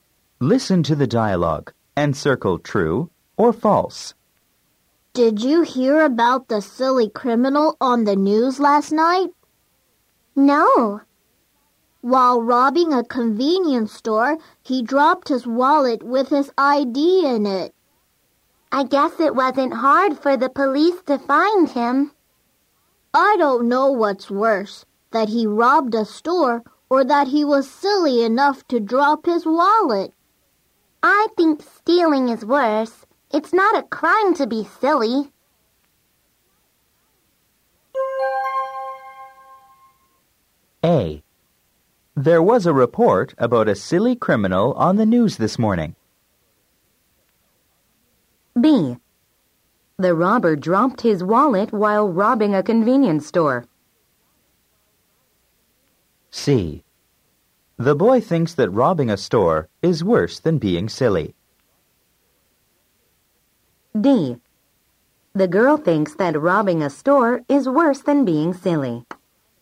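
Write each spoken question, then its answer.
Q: There was a report about a silly criminal on the news this morning.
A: False

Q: The robber dropped his wallet while robbing a convenience store.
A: True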